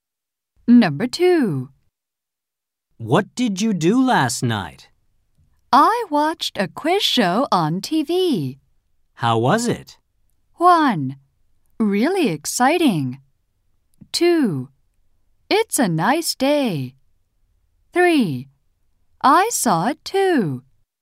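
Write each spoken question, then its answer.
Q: How was it?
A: 1: Really exciting.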